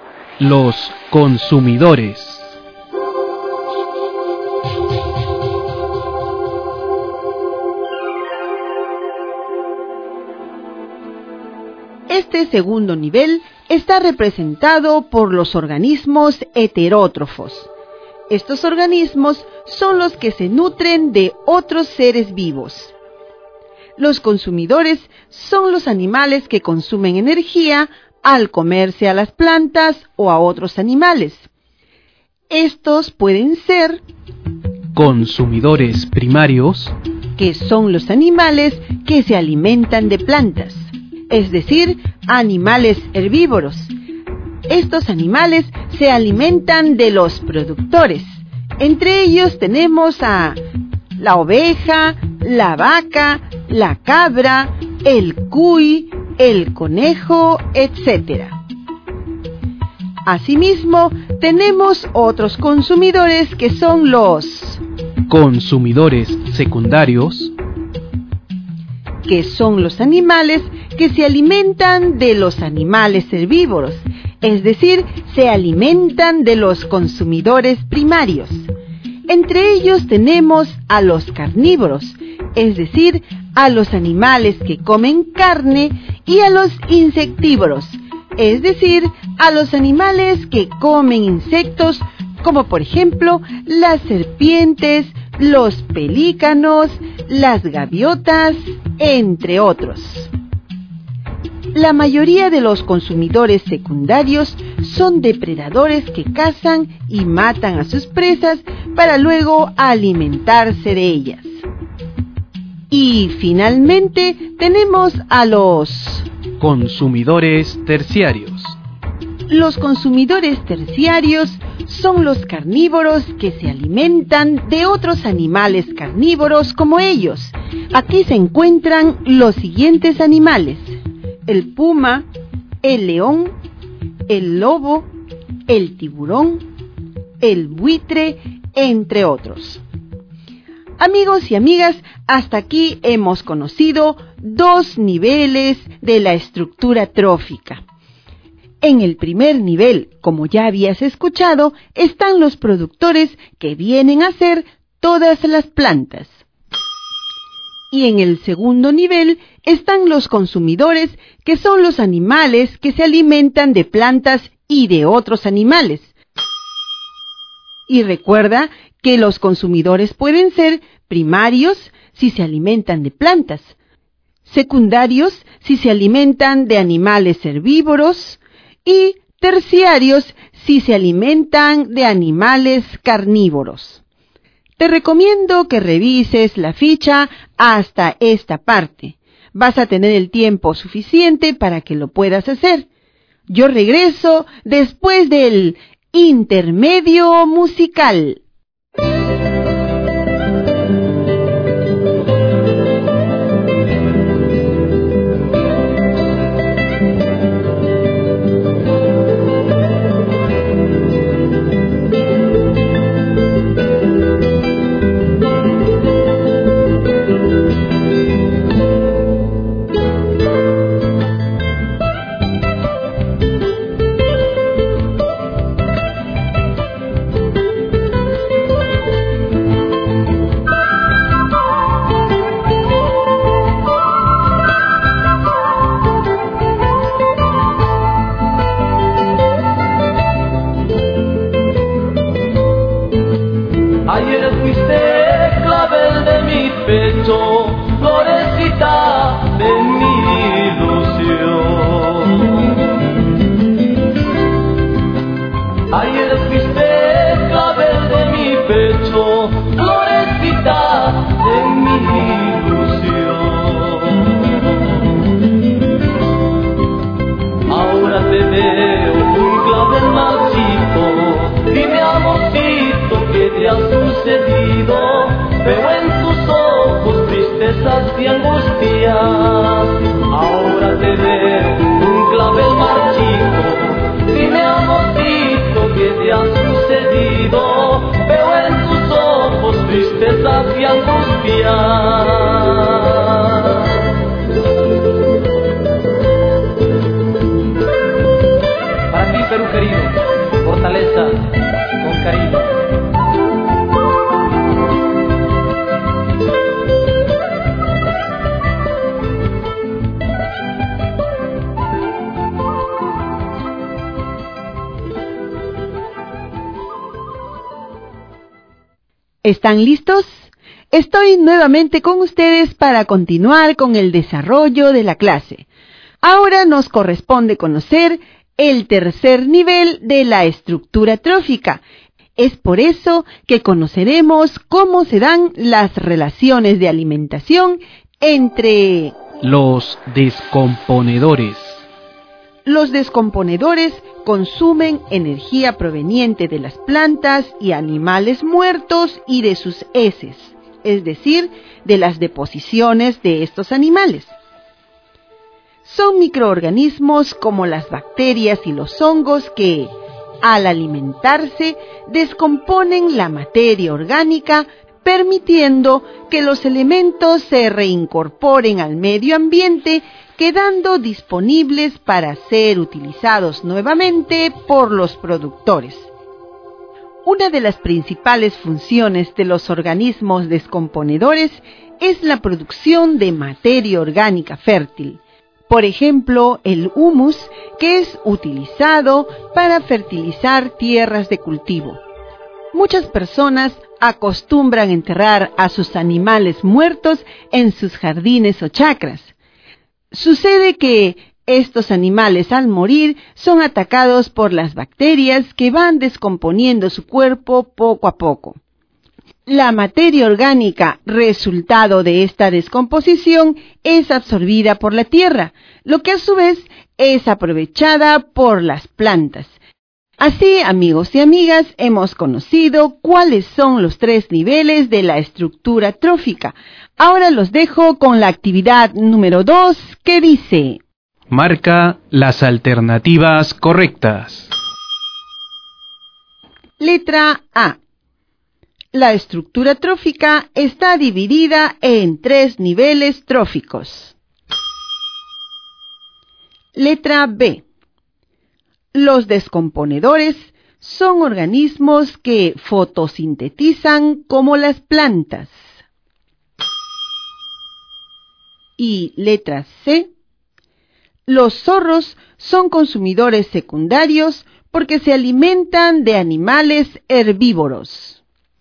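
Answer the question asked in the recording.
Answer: A: La estructura trófica está dividida en tres niveles tróficos; C: Los zorros son consumidores secundarios porque se alimentan de animales herbívoros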